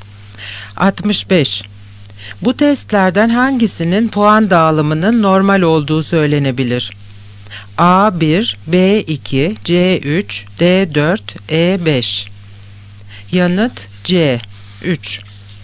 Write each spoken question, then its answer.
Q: Bu testlerden hangisinin puan dağılımının normal olduğu söylenebilir?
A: Yanıt C 3.